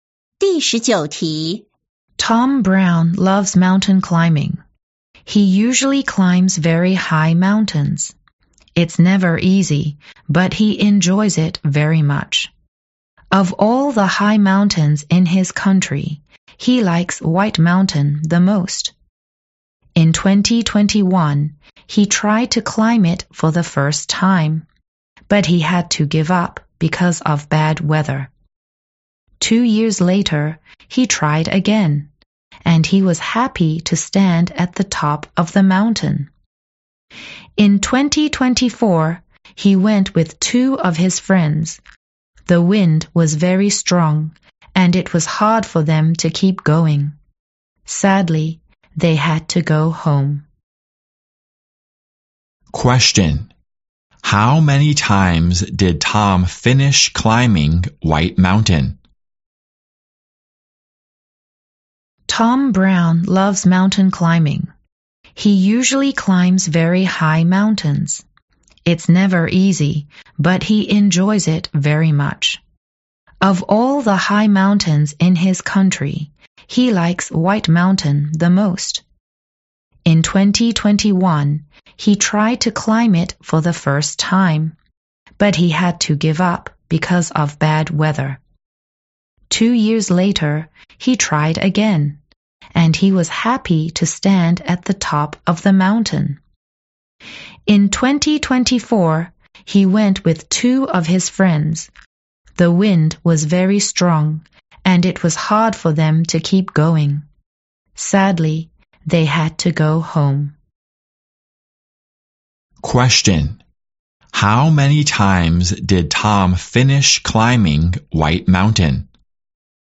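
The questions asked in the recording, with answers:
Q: How many times did Tom finish climbing White Mountain?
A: Once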